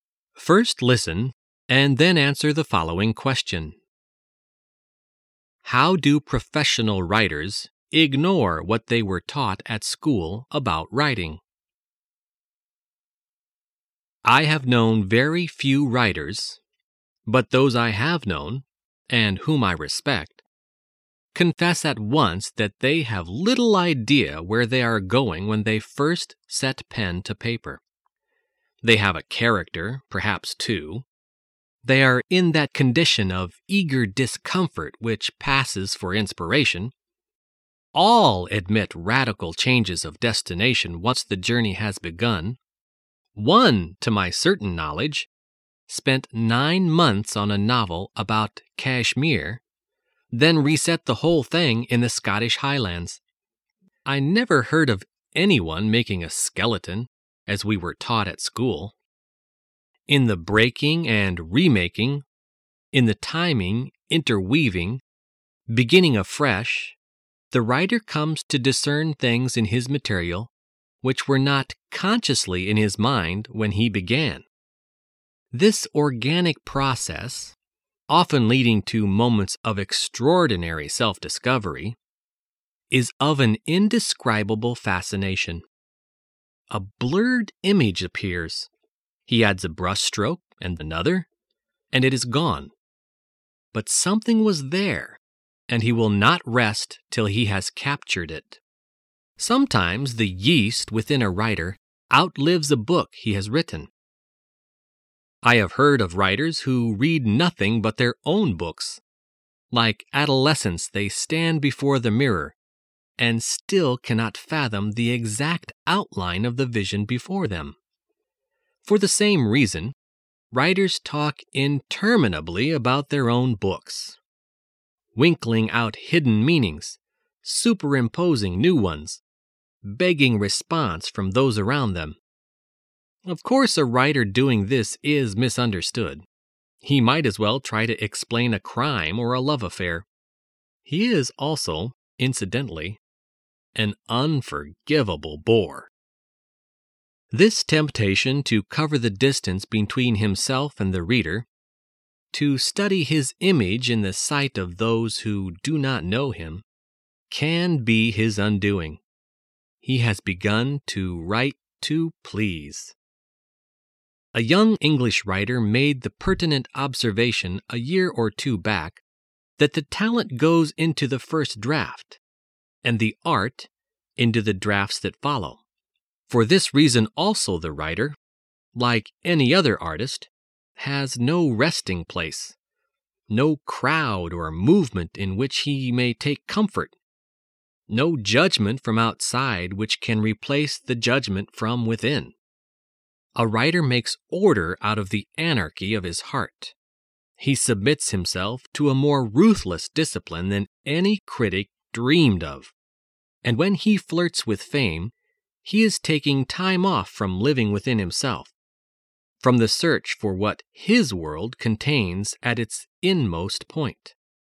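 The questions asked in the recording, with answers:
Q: How do professional writers ignore what they were taught at school about writing?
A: They don't make a skeleton (outline) before writing; they start with little idea where they are going.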